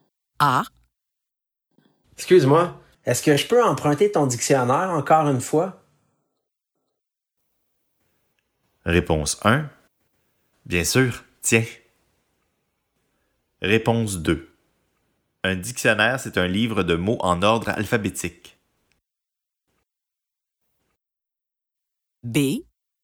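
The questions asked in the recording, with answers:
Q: Excuse-moi, est-ce que je peux emprunter ton dictionnaire encore une fois?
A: 1: Bien sûr, tiens.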